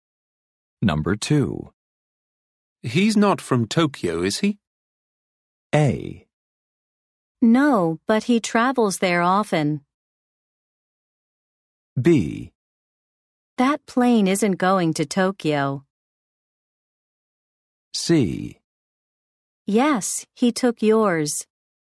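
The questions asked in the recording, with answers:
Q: He's not from Tokyo, is he?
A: A: No, but he travels there often.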